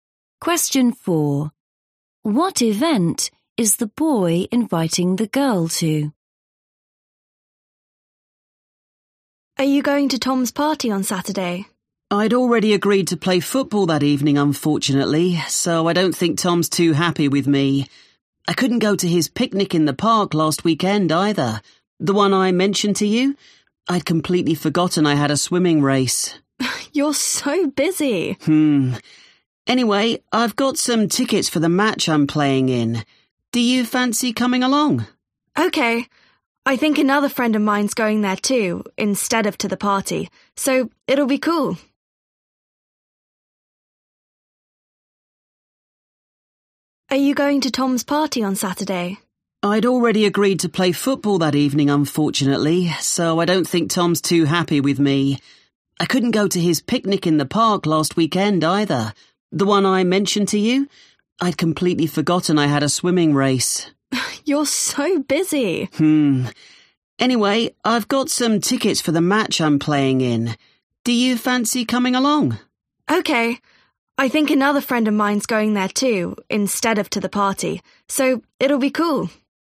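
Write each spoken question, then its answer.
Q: What event is the boy inviting the girl to?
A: a football match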